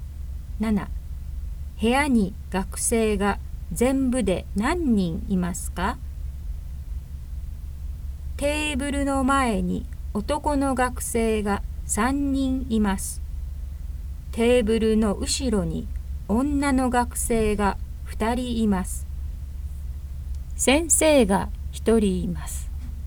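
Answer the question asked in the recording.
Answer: 5人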